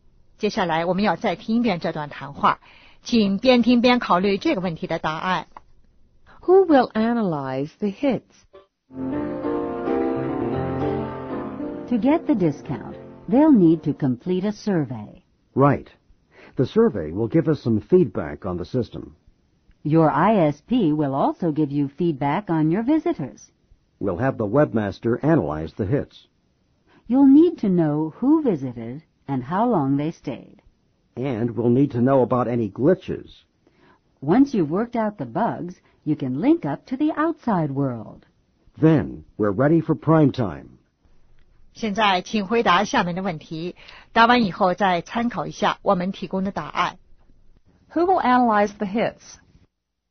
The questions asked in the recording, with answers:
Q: Who will analyze the hits?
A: The webmaster.